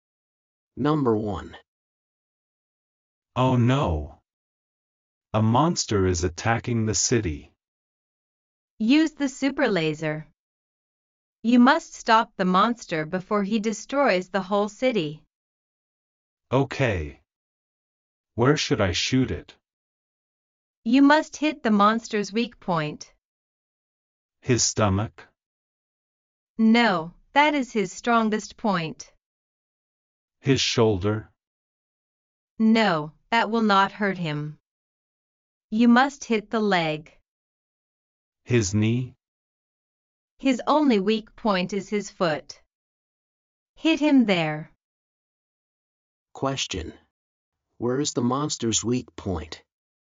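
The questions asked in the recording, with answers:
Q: Where is the monster's weak point?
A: His foot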